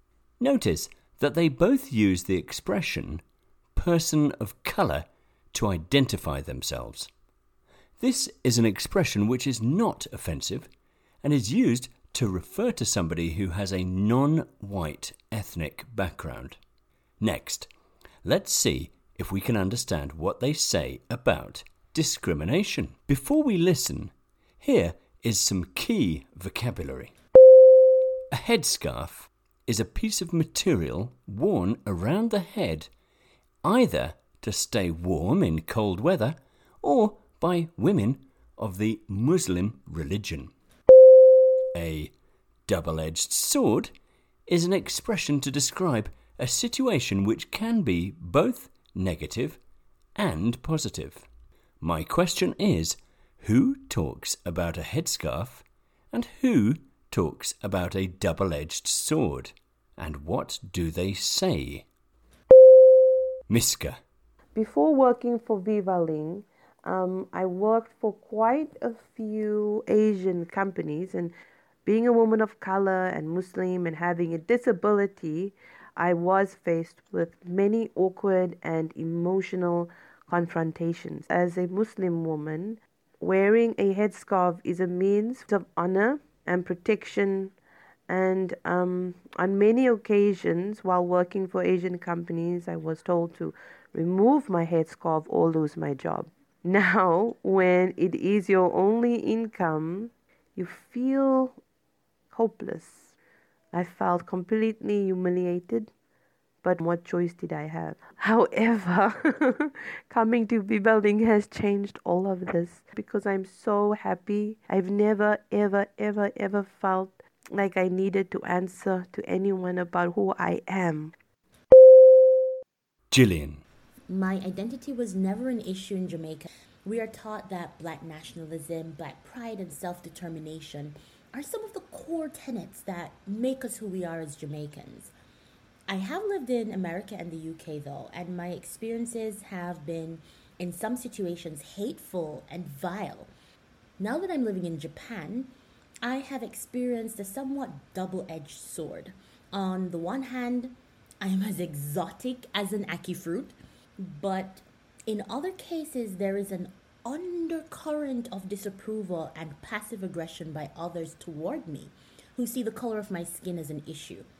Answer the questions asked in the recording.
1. You will notice that Miska talked about the headscarf.
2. She mentioned that working as a teacher in some companies, she felt humiliated and hopeless because she had to remove her headscarf.